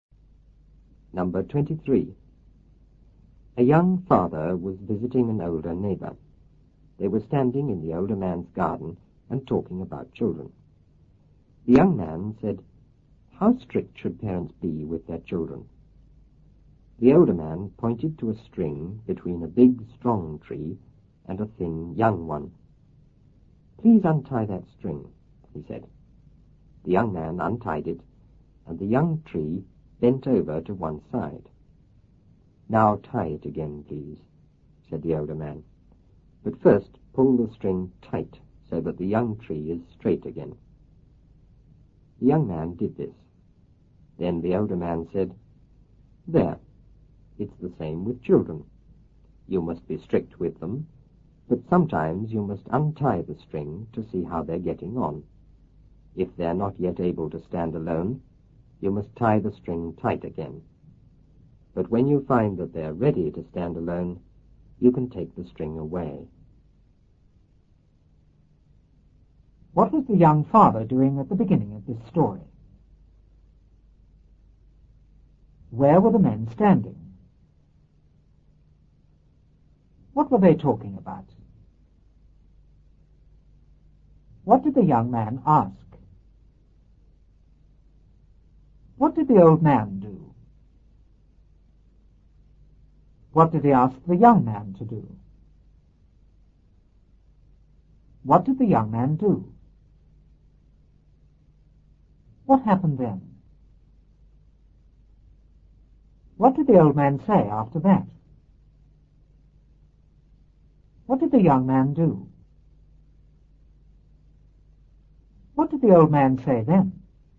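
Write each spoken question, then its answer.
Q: What was the young father doing at the beginning of this story?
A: Visiting an older neighbor

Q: Where were the men standing?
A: In the older man's garden

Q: What were they talking about?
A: Children

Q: What did the young man ask?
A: How strict parents should be with their children

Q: What did the old man do?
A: He pointed to a string between a big, strong tree and a thin, young one

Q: What did he ask the young man to do?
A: Untie the string

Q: What did the young man do?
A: He untied it

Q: What happened then?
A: The young tree bent over to one side

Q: What did the old man say after that?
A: Tie it again, but first pull the string tight so the young tree is straight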